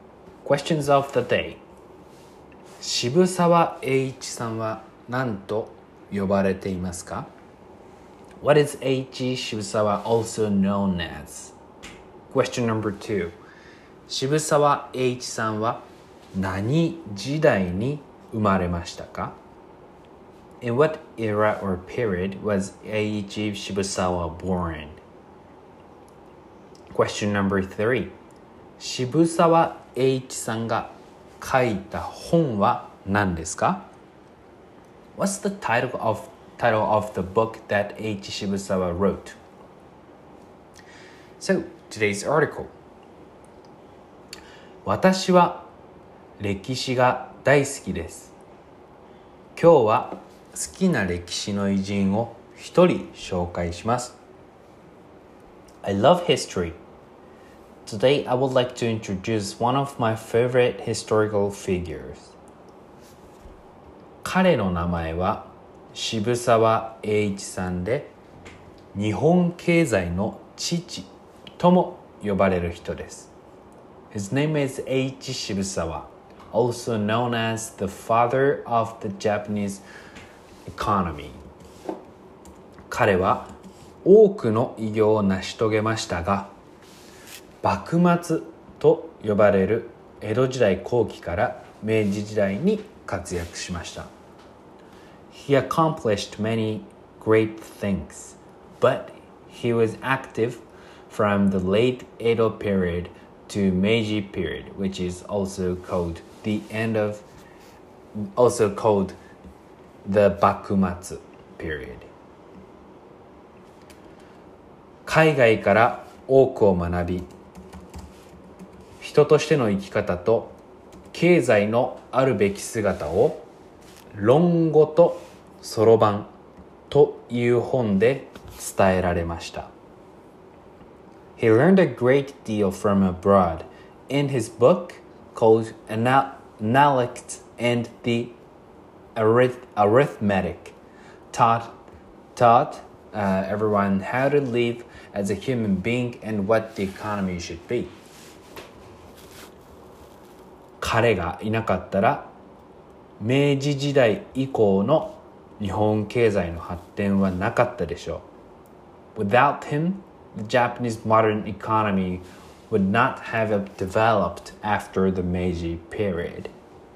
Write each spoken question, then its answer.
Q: 渋沢栄一さんは何と呼ばれていますか?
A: 日本経済の父

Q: 渋沢栄一さんが書いた本は何ですか?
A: 論語とそろばん。